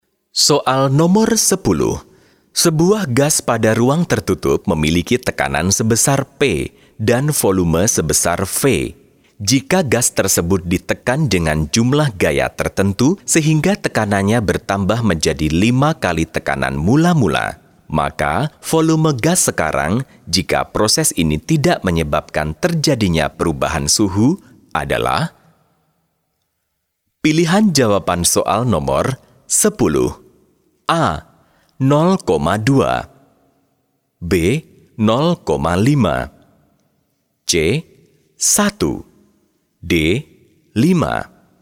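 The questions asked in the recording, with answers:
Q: Jika gas tersebut ditekan dengan jumlah gaya tertentu sehingga tekanannya bertambah menjadi 5 kali tekanan mula-mula, maka volume gas sekarang jika proses ini tidak menyebabkan terjadinya perubahan suhu adalah?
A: A: 0,2 V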